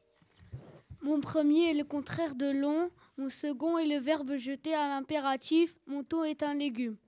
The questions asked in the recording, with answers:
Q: Mon tout est un légume.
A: Ici, il s'agissait de la courgette.